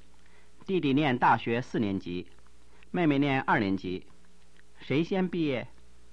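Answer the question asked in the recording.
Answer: 弟弟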